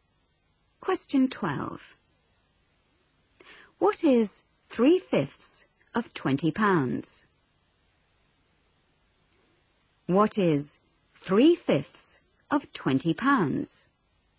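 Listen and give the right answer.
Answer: £12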